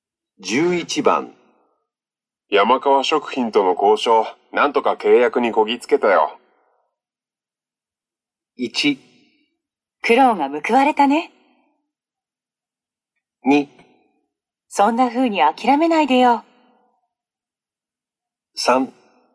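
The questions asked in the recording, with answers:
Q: 山川食品との交渉、なんとか契約にこぎつけたよ。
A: 1: 苦労が報われたね。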